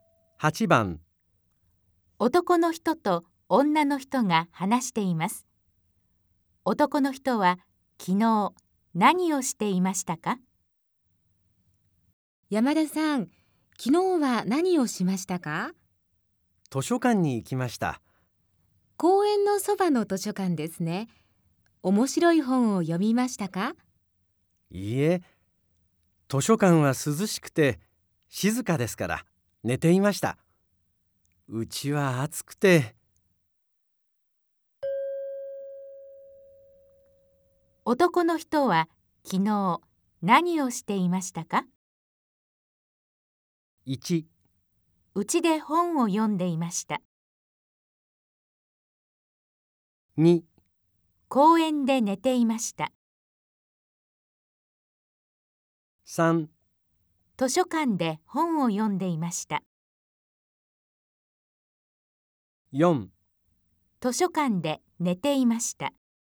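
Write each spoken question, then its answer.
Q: 男の人は昨日何をしていましたか?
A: 4: 図書館で寝ていました。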